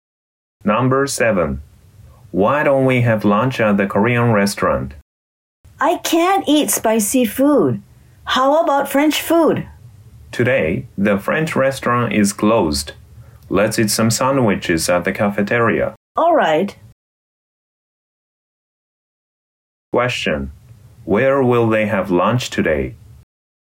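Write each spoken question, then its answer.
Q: Where will they have lunch today?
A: At the cafeteria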